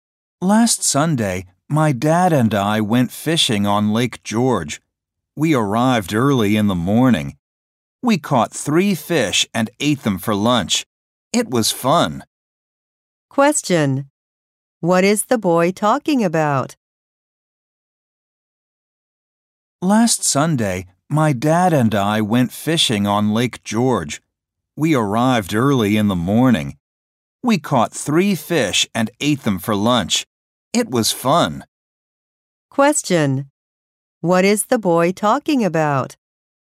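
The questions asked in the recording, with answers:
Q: What is the boy talking about?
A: His fishing trip with his dad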